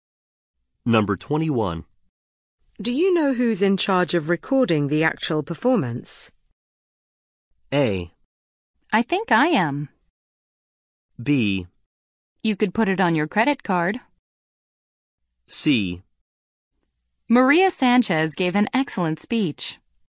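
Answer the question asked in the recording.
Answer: A: I think I am.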